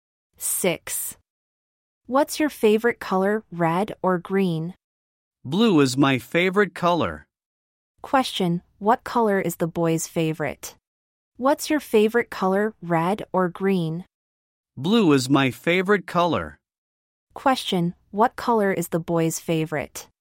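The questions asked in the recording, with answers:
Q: Question, what color is the boy's favorite?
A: Blue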